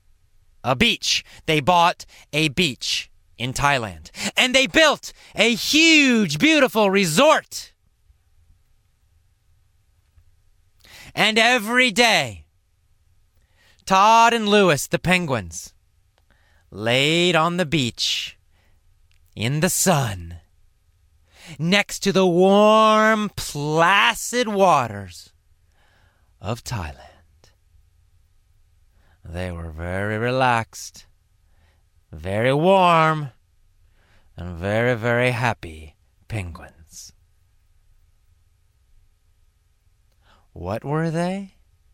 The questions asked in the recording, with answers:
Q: What were they?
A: They were warm, relaxed, happy penguins.